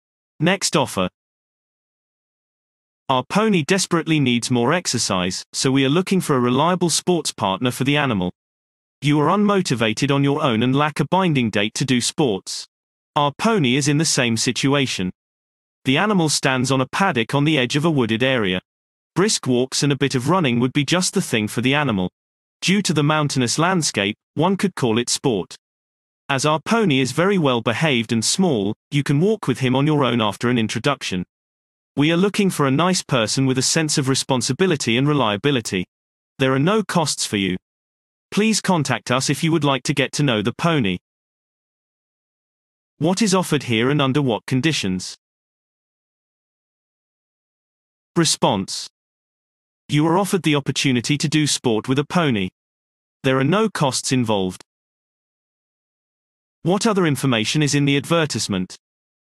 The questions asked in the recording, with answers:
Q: What other information is in the advertisement?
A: The pony urgently needs more exercise.